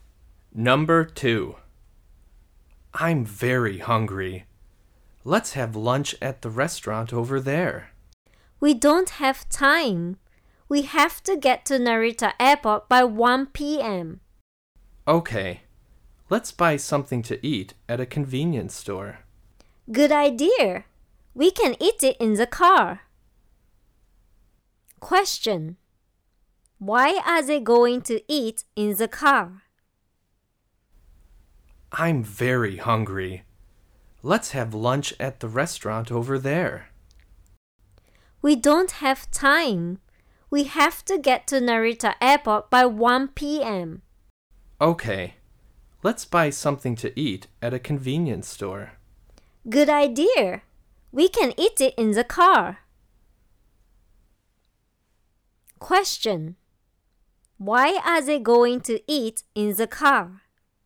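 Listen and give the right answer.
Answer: They have no time; they must get to Narita Airport by 1 p.m.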